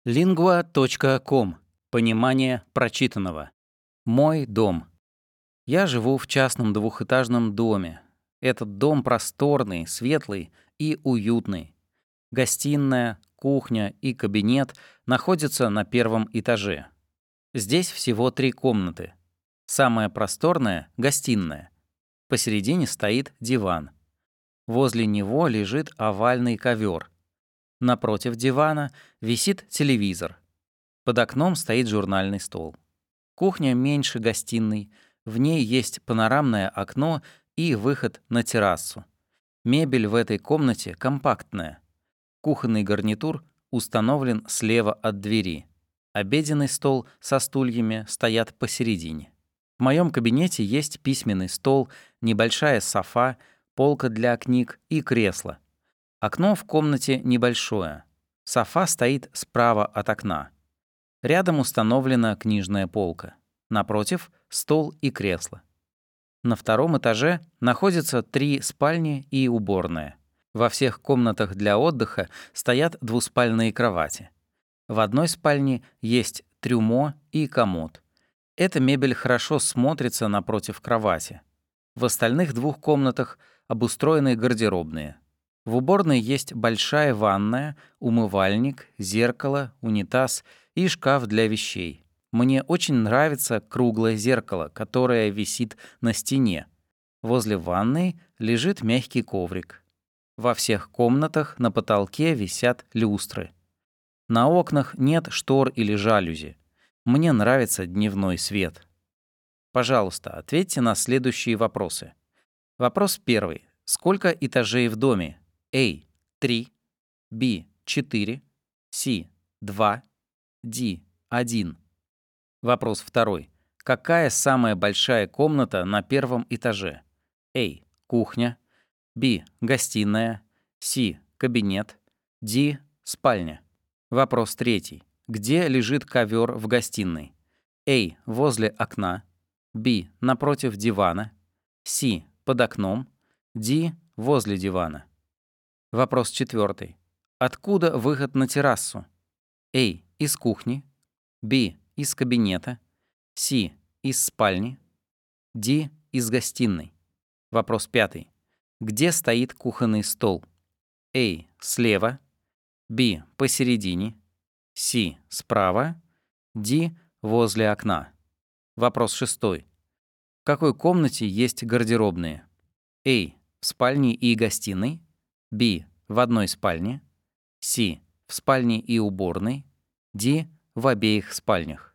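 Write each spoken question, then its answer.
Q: Сколько этажей в доме?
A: C: 2

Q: Какая самая большая комната на первом этаже?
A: B: гостиная

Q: Где лежит ковер в гостиной?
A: D: возле дивана

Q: Откуда выход на террасу?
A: A: Из кухни

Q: Где стоит кухонный стол?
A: B: Посередине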